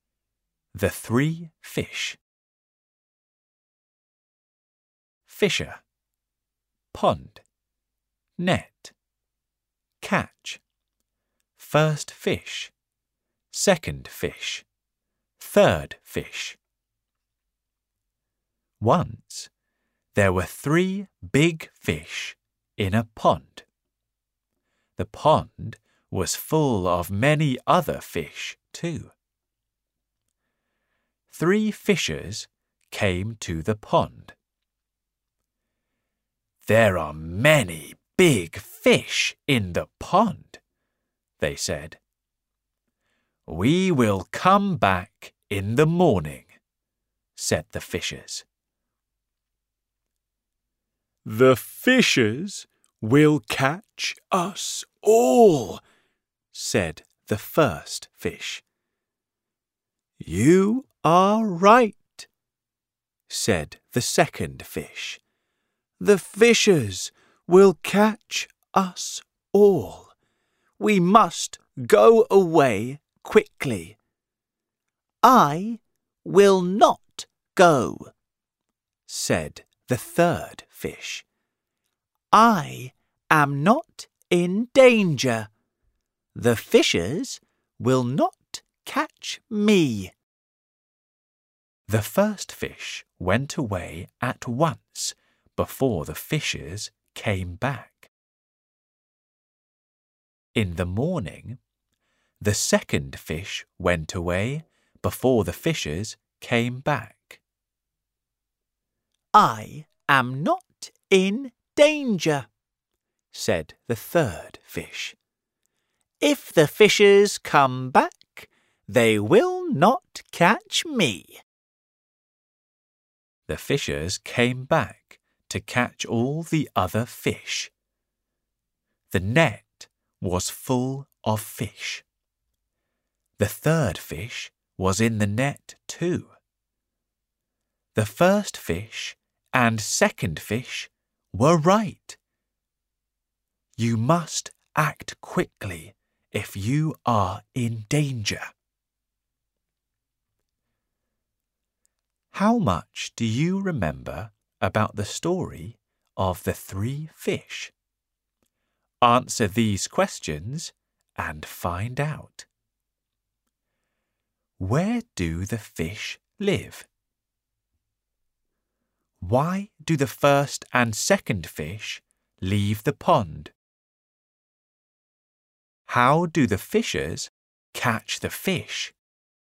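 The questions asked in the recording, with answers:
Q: Where do the fish live?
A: In a pond

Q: Why do the first and second fish leave the pond?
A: Because the fishers will catch them all; they are in danger

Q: How do the fishers catch the fish?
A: With a net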